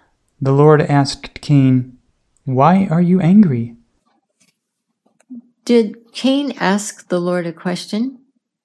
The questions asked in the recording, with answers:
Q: Did Cain ask the Lord a question?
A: No, the Lord asked Cain a question.